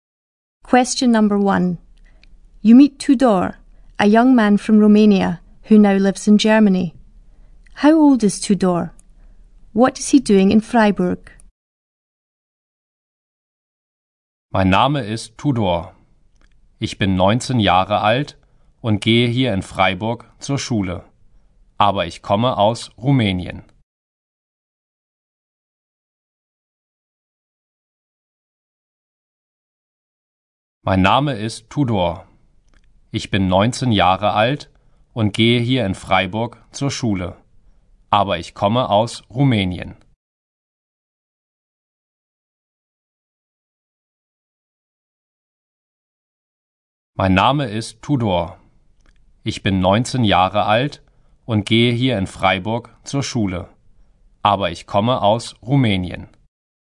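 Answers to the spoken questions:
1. 19
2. Going to school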